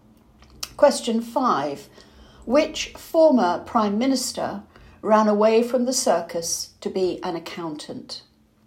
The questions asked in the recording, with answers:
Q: Which former Prime Minister ran away from the circus to be an accountant?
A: John Major.